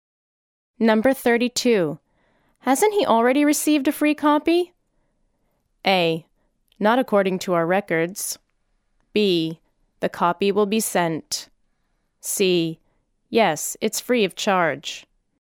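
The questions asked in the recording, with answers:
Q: Hasn't he already received a free copy?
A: A: Not according to our records.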